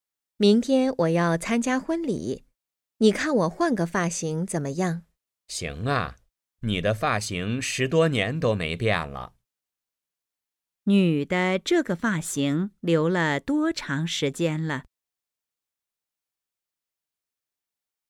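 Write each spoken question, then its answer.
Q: 女的这个发型留了多长时间了?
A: 10多年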